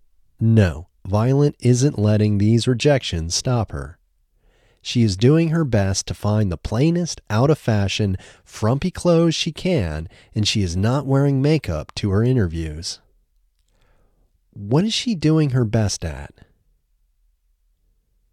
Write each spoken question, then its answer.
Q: What is she doing her best at?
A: She is doing her best to find the plainest, out-of-fashion, frumpy clothes she can.